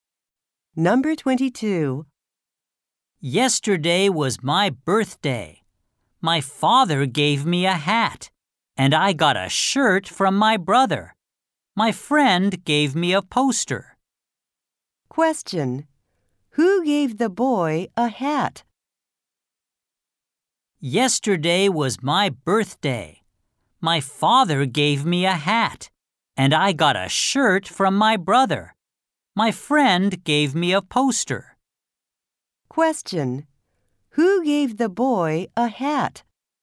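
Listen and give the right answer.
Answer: His father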